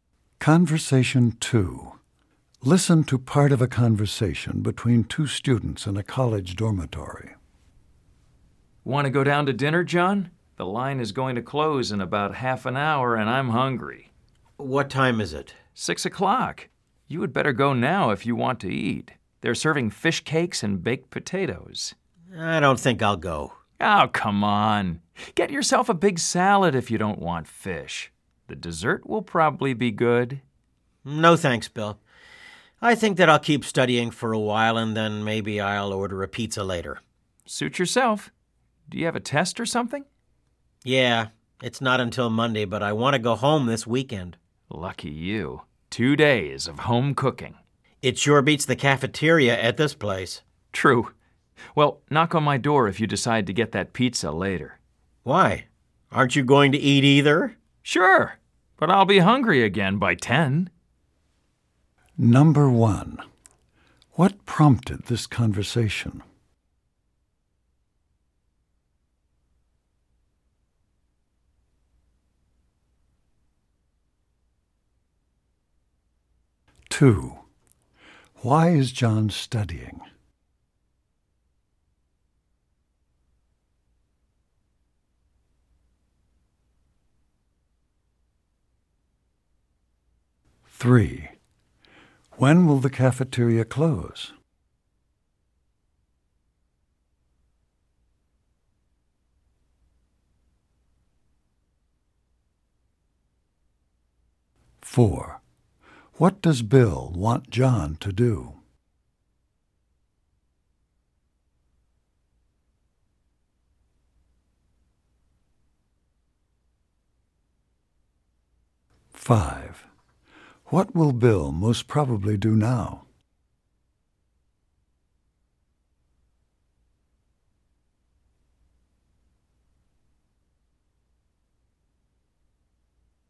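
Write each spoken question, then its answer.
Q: What prompted this conversation?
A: Bill wanted John to go to dinner

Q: Why is John studying?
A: He has a test Monday and wants to go home this weekend

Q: When will the cafeteria close?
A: At 6:30

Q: What will Bill most probably do now?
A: Go to dinner in the cafeteria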